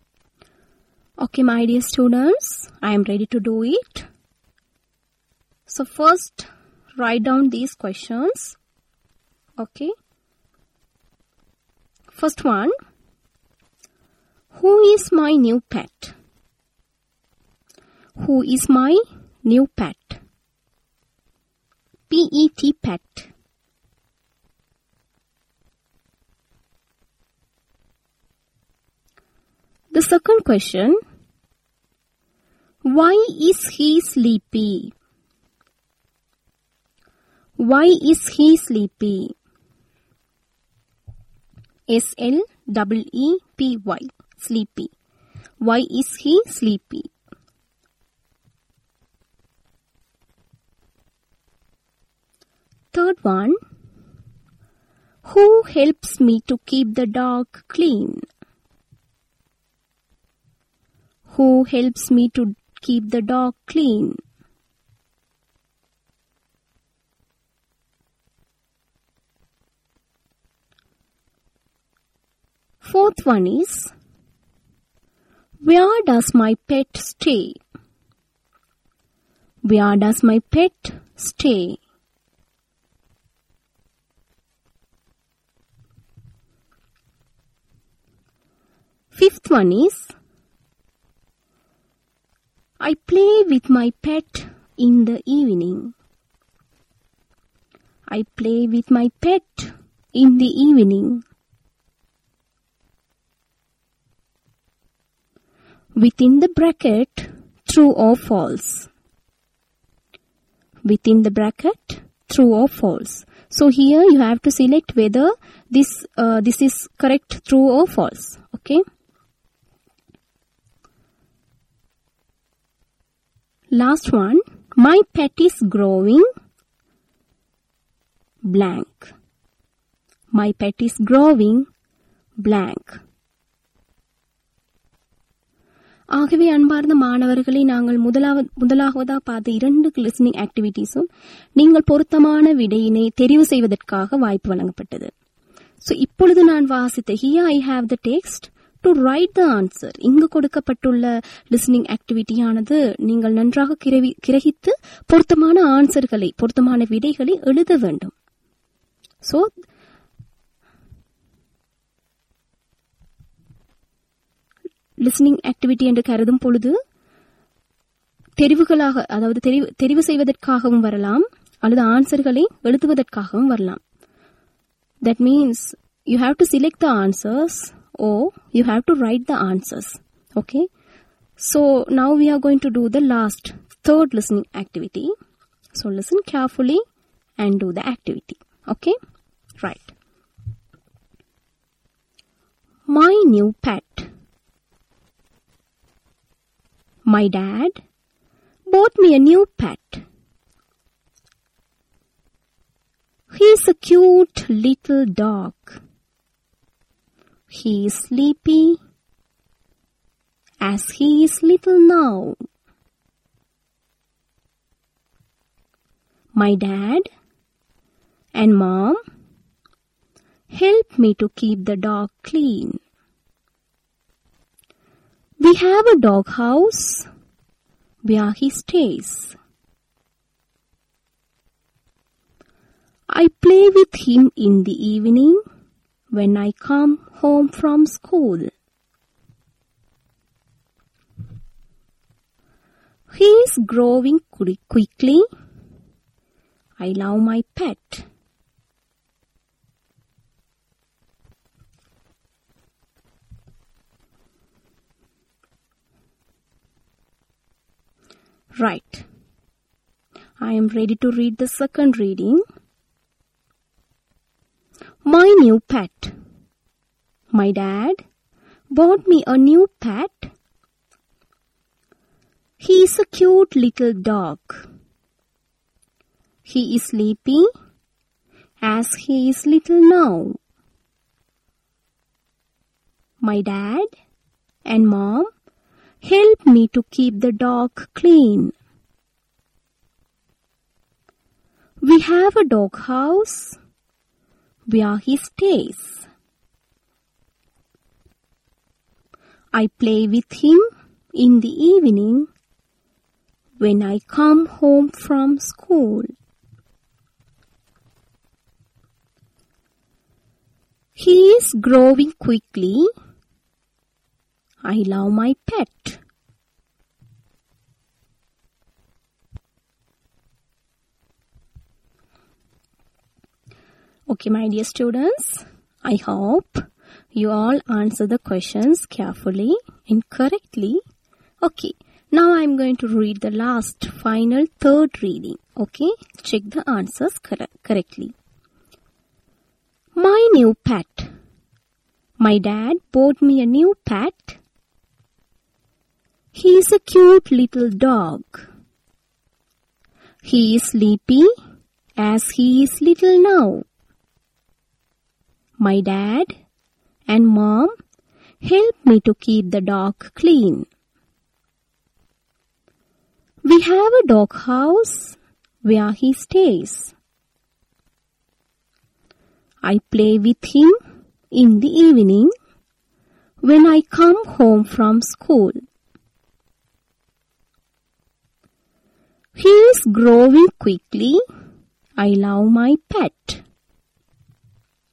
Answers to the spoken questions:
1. The correct answer is little dog.
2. So the answer is because he is little now.
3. Simply you can answer the question, Mom and Dad.
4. So the correct answer is in a dog house.
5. So the answer is true
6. The correct answer is quickly.